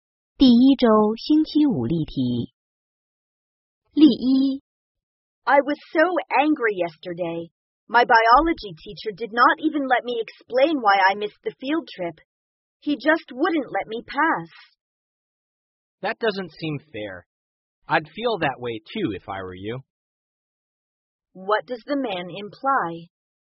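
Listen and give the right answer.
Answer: He sympathizes with her and would feel angry too.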